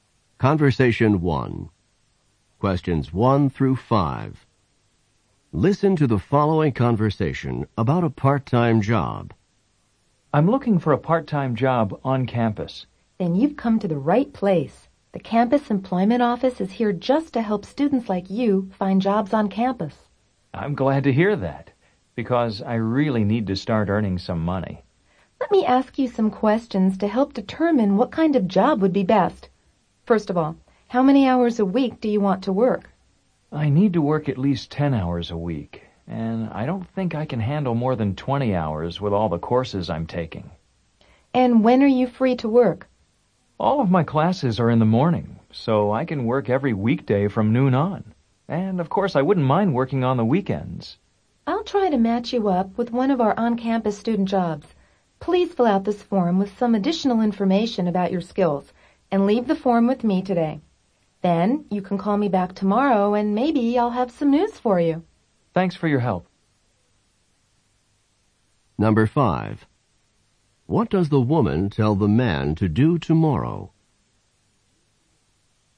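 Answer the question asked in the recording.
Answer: Call her back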